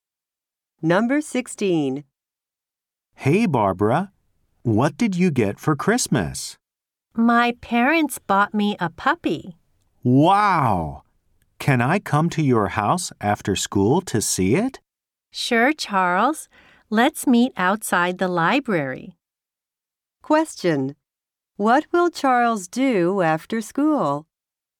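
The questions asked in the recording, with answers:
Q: What will Charles do after school?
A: Go to Barbara's house to see her puppy.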